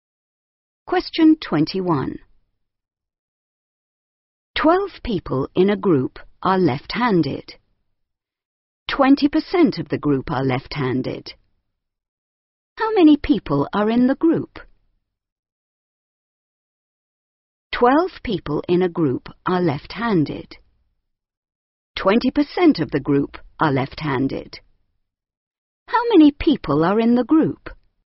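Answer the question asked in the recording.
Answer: 60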